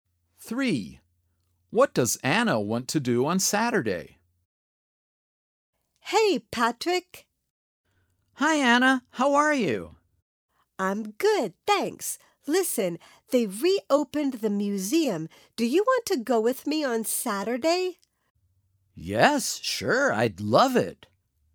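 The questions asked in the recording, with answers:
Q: What does Anna want to do on Saturday?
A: Go to the museum.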